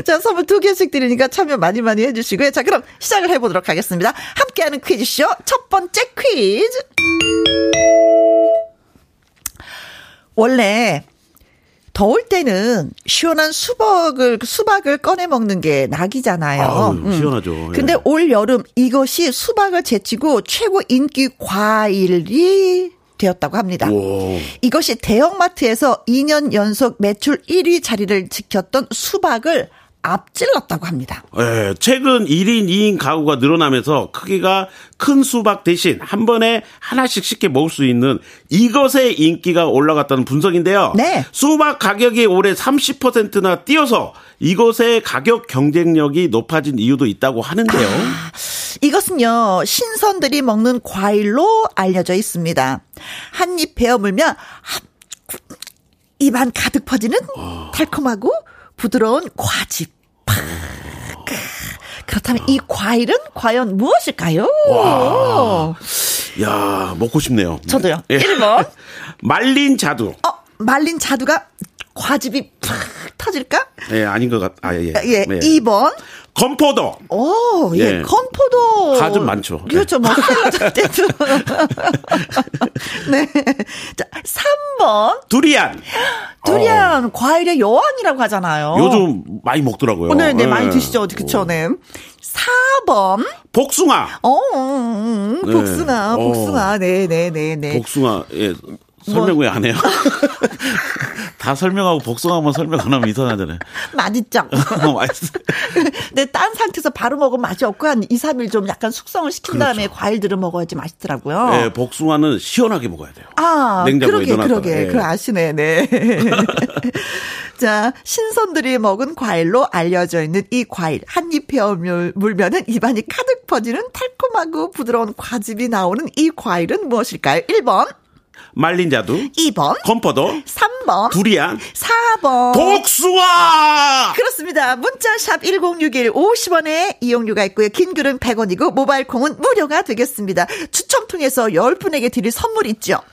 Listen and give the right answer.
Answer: 정답은 네 복숭아